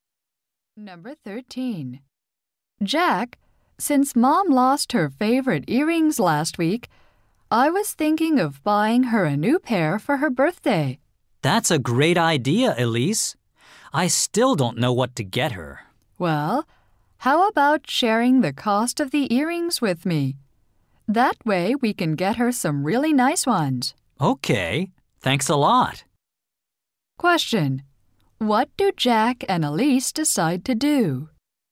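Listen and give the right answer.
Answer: Share the cost of earrings for their mom.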